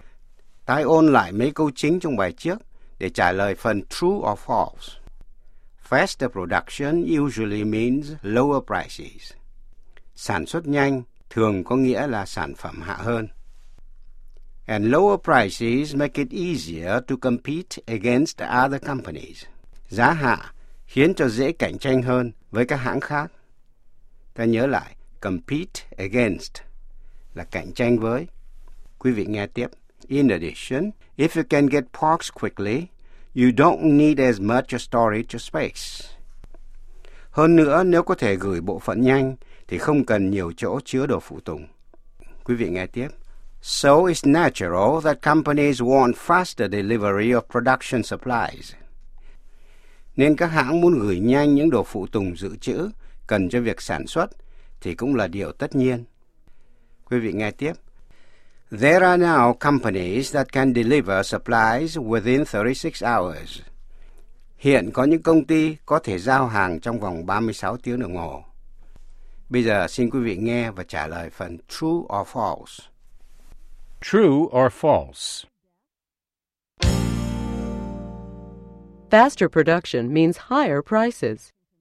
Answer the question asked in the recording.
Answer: False. Faster production usually means lower prices.